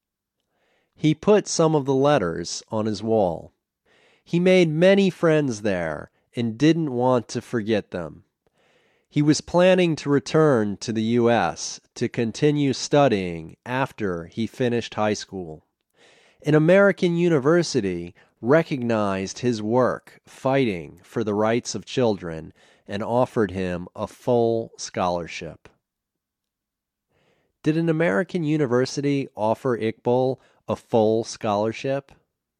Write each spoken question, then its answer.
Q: Did an American university offer Iqbal a full scholarship?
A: Yes, an American university offered him a full scholarship.